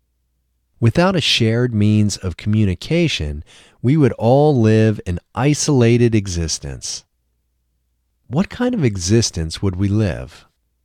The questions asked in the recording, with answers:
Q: What kind of existence would we live?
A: We would live an isolated existence.